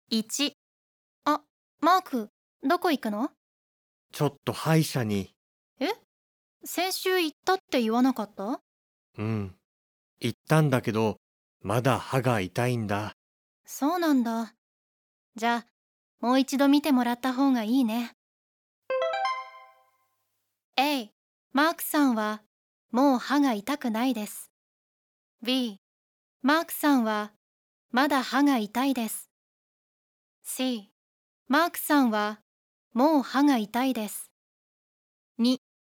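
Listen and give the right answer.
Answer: B: マークさんはまだ歯が痛いです。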